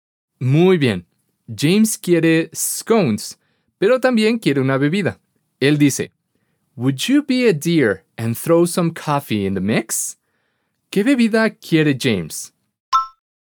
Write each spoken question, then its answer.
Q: ¿Qué bebida quiere James?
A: Exacto. Coffee.